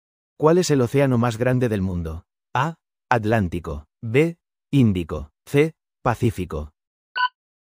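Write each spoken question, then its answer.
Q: ¿Cuál es el océano más grande del mundo?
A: C: Pacífico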